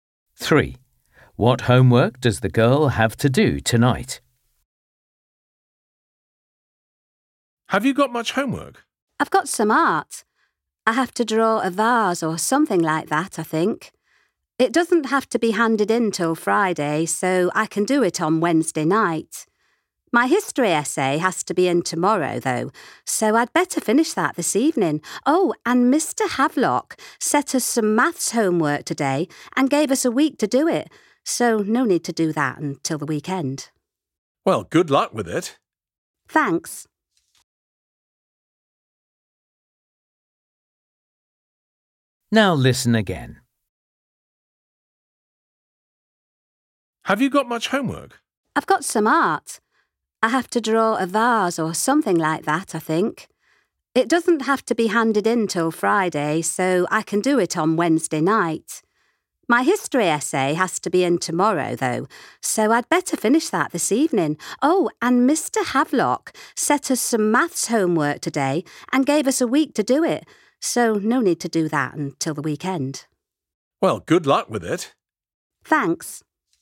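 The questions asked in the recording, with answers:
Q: What homework does the girl have to do tonight?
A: history essay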